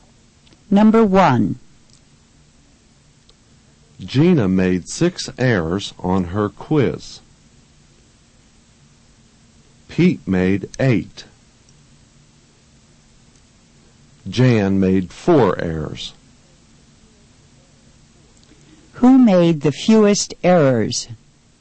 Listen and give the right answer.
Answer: Jan made the fewest errors.